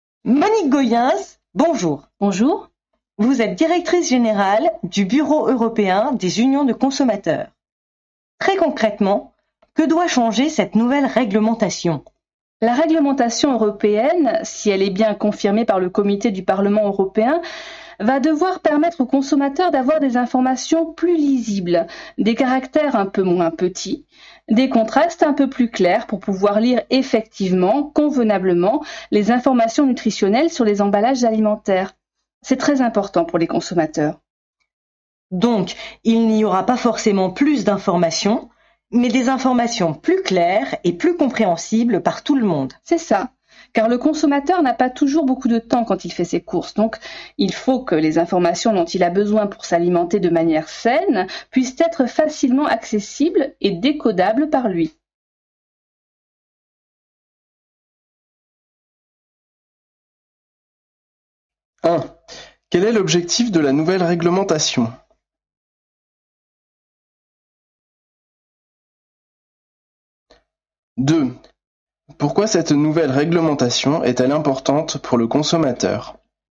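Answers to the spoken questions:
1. Rendre les informations nutritionnelles sur les emballages plus lisibles et plus claires (caractères moins petits, contrastes plus clairs).
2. Parce que le consommateur a peu de temps pour ses courses et doit pouvoir accéder facilement aux informations pour s'alimenter sainement.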